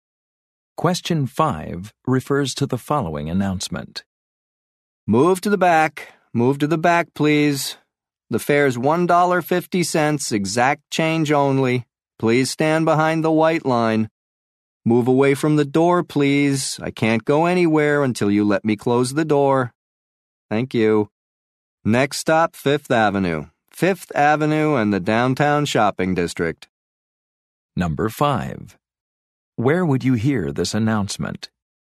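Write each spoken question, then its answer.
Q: Where would you hear this announcement?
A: On a bus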